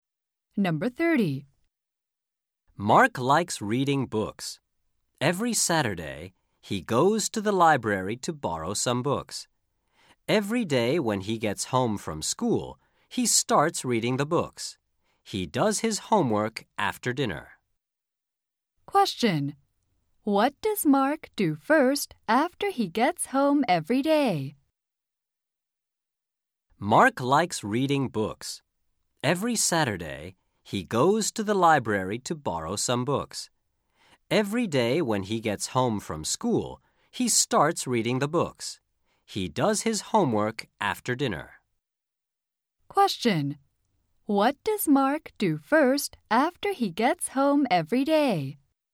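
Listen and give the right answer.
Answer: He reads books.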